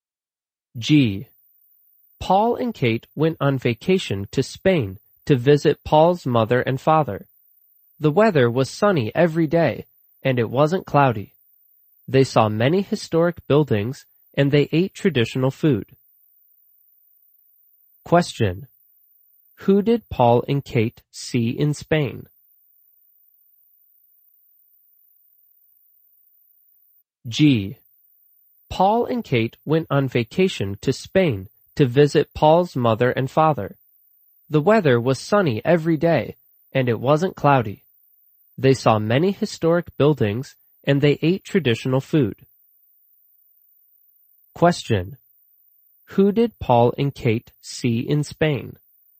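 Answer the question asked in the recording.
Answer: Paul's mother and father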